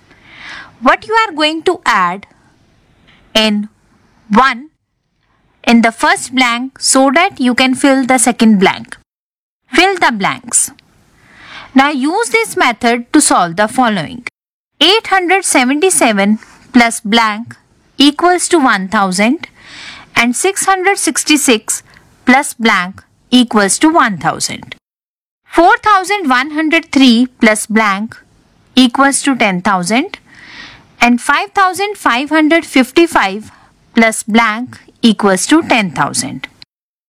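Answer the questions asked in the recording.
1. 123
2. 334
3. 5897
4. 4445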